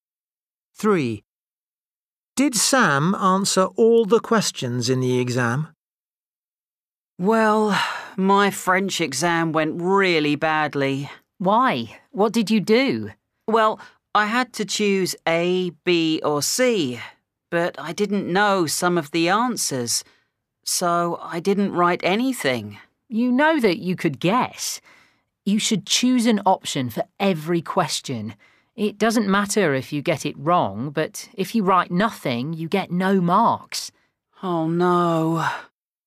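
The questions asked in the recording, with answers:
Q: Did Sam answer all the questions in the exam?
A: No, he left some answers blank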